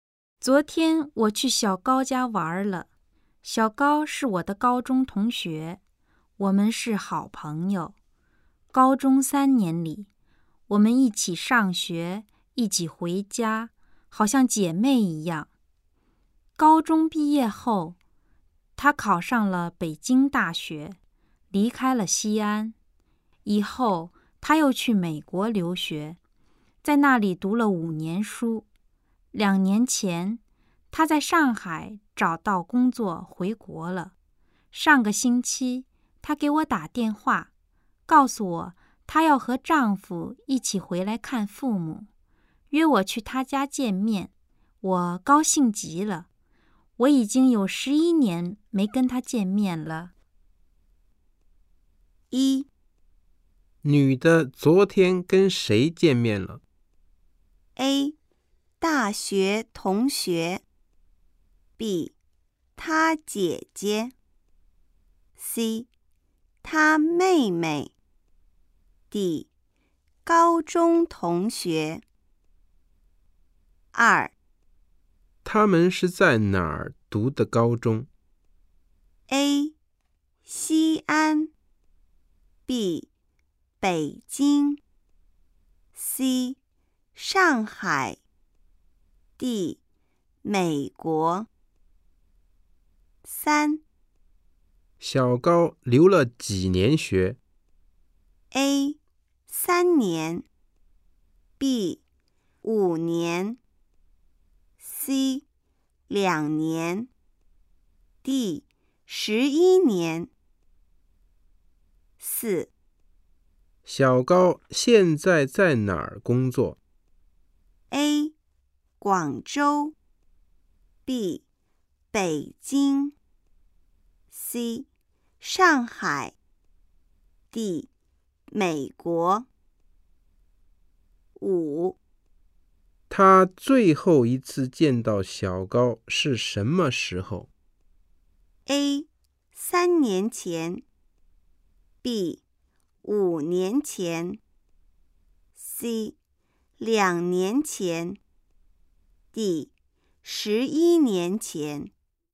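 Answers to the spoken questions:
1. D: 高中同学
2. A: 西安
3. B: 五年
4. C: 上海
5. D: 11年前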